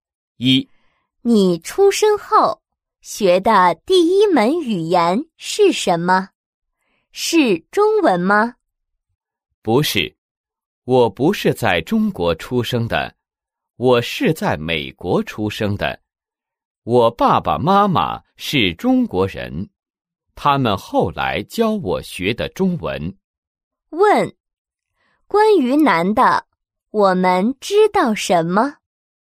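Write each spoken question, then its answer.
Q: 问,关于男的,我们知道什么?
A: 他在美国出生,第一门语言不是中文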